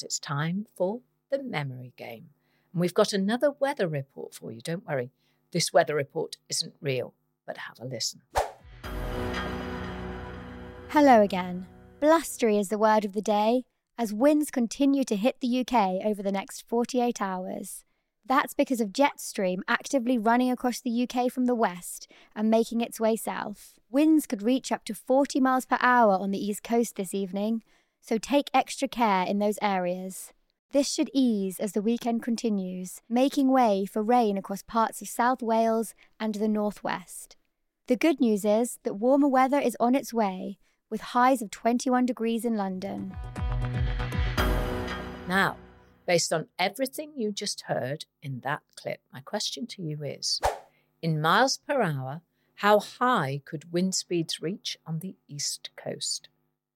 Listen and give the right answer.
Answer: is 40 miles an hour.